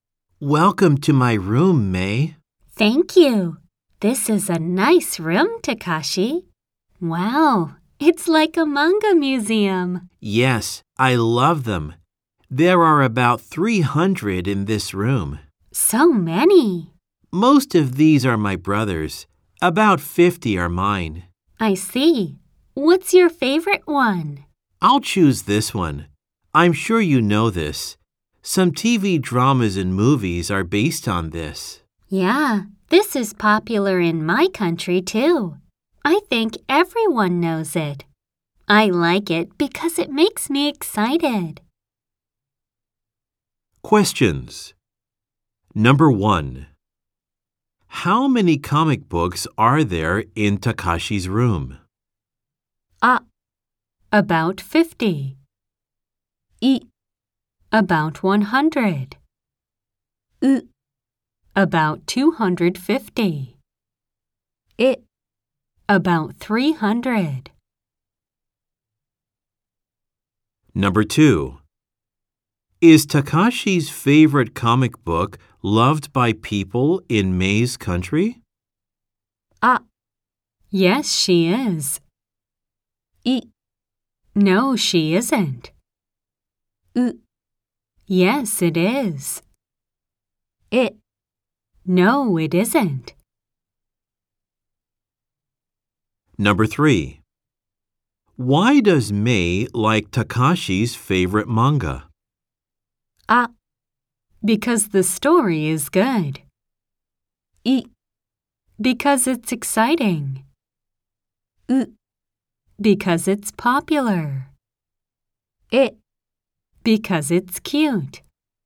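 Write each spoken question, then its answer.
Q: How many comic books are there in Takashi's room?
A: え: About 300.

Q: Is Takashi's favorite comic book loved by people in May's country?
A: う: Yes, it is.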